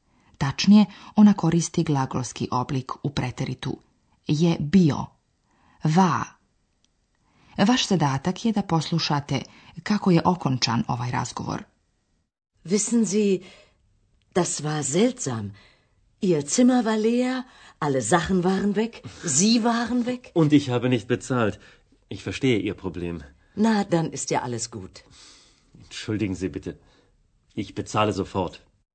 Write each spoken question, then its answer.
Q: Vaš zadatak je da poslušate kako je okončan ovaj razgovor.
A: Vjerovatno ste razumjeli da gospodin Mayer želi da plati.